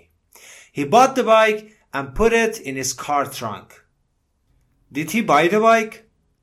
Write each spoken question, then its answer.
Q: Did he buy the bike?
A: Yes, he bought it. Jimmy bought the bike.